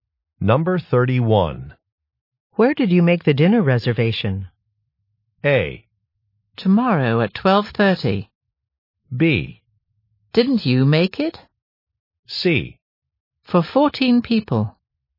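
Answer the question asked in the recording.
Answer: B: Didn't you make it?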